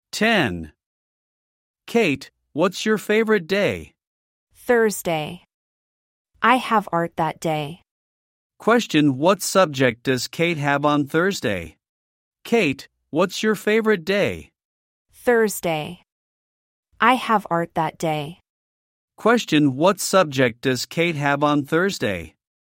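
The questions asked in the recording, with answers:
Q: Question, what subject does Kate have on Thursday?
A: Art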